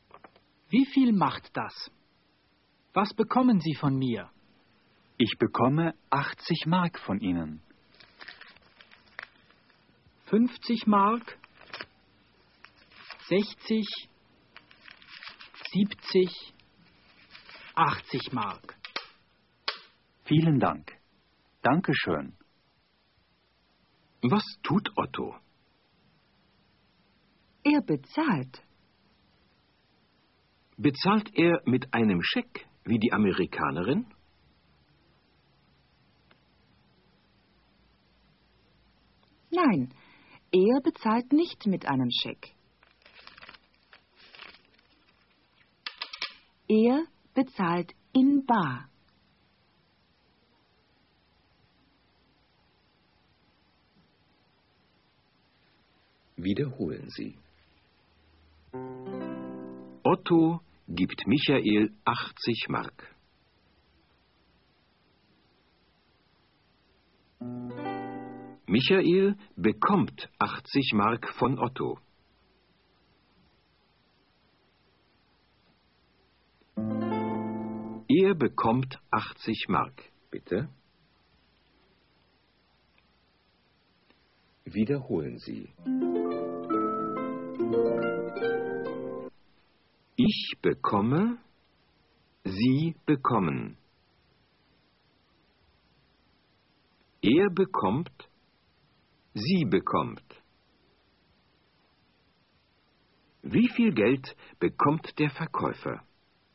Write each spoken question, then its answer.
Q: Wie viel Geld bekommt der Verkäufer?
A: Er bekommt 80 Mark.